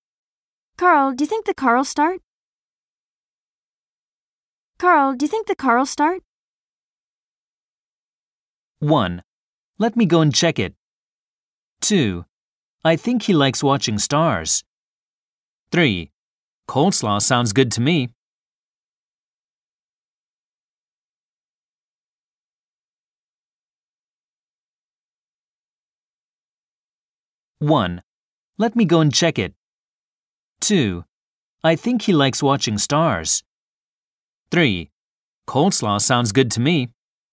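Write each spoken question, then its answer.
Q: Carl, do you think the car will start?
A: 1: Let me go and check it.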